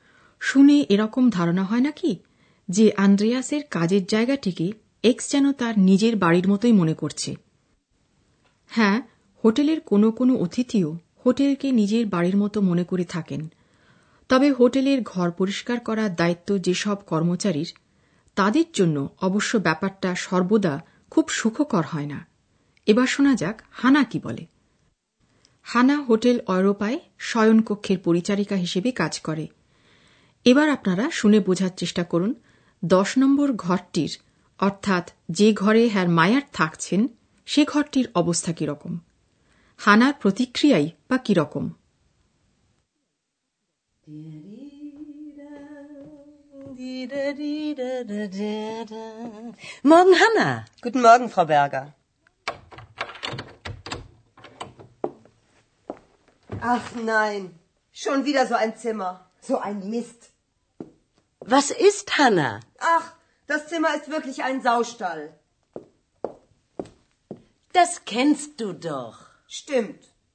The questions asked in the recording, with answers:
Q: দশ নম্বর ঘরটির অর্থাৎ যে ঘরে হ্যার মায়ার থাকছেন সে ঘরটির অবস্থা কীরকম হানার প্রতিক্রিয়াই বা কীরকম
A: হানার কাছে ঘরটা শুয়োরের খোঁয়ার বলে মনে হচ্ছে ঘরের অবস্থা দেখে সে বেশ রেগে গেছে বিরক্তি প্রকাশ করছে মুখে